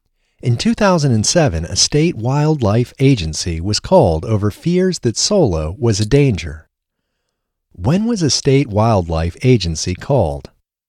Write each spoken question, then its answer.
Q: When was a state wildlife agency called?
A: A state wildlife agency was called in 2007.